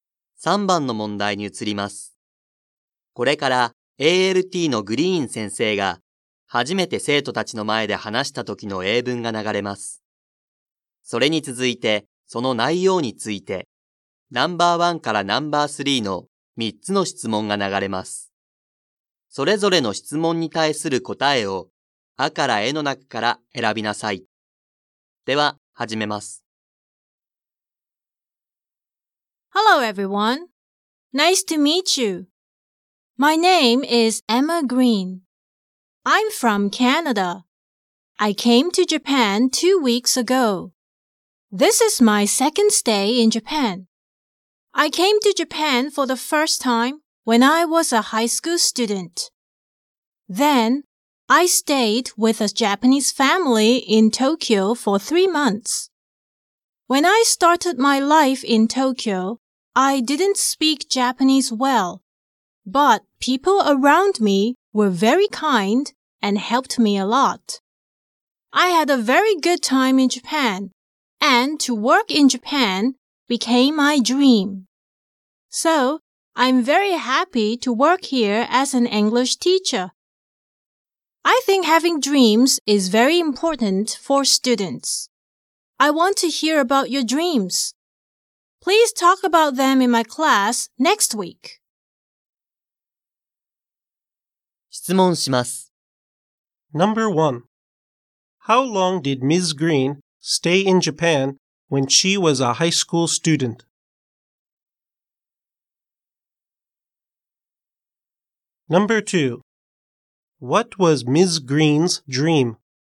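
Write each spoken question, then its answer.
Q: How long did Ms. Green stay in Japan when she was a high school student?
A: For 3 months

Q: What was Ms. Green's dream?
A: To work in Japan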